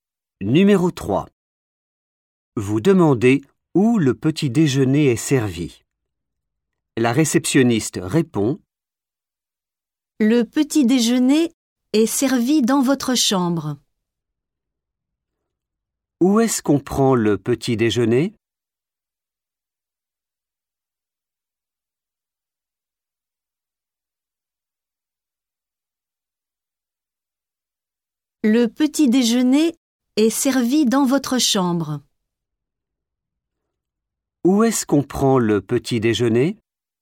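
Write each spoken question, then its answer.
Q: Où est-ce qu'on prend le petit déjeuner?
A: dans votre chambre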